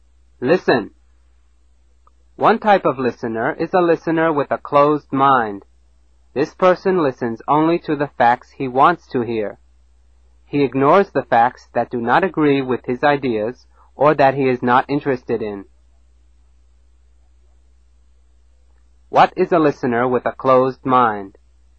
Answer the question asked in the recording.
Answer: A person who does not listen to all the facts.